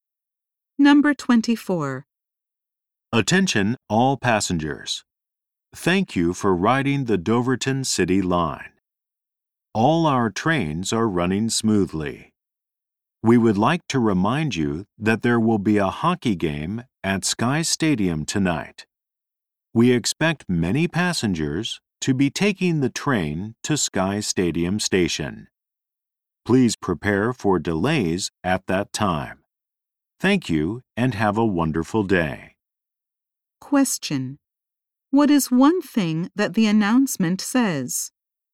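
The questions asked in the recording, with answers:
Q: What is one thing that the announcement says?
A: There may be delays because of a hockey game at Sky Stadium tonight.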